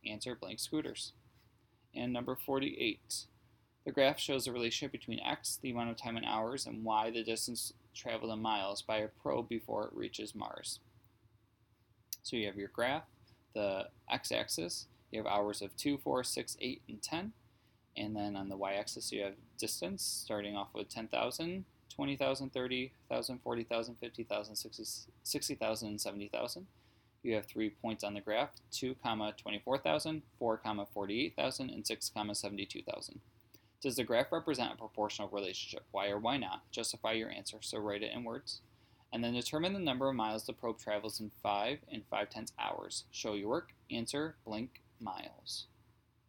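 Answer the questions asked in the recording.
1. Yes, it is a straight line through the origin with a constant rate of 12,000 miles per hour
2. 66,000 miles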